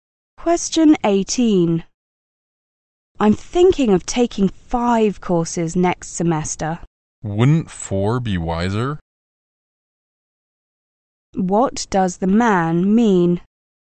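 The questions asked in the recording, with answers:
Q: What does the man mean?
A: The woman should take 4 courses, not 5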